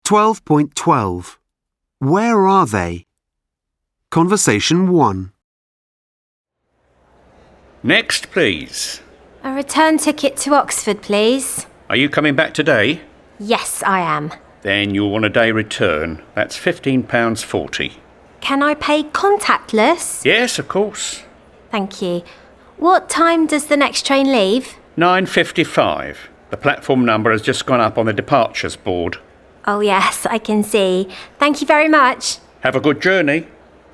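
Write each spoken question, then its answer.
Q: Where are they?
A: At a train station ticket office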